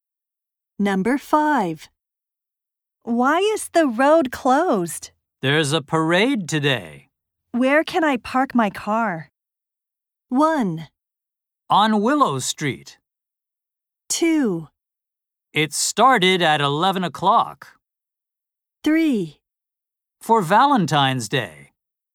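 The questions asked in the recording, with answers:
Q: Where can I park my car?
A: 1: On Willow Street.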